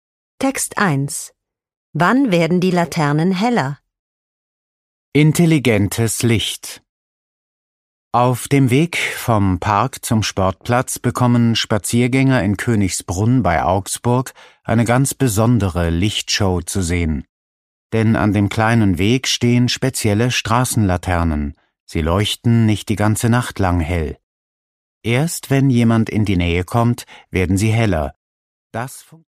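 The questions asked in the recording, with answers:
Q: Wann werden die Laternen heller?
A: Wenn jemand in die Nähe kommt.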